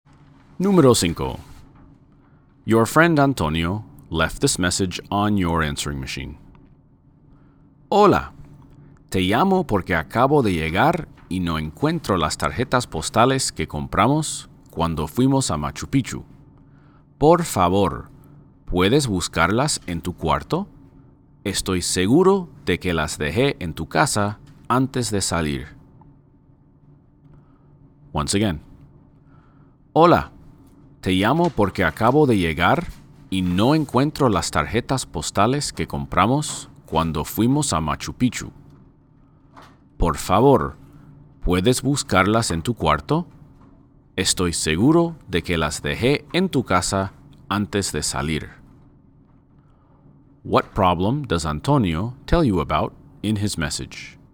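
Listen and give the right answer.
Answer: He can't find the postcards they bought at Machu Picchu.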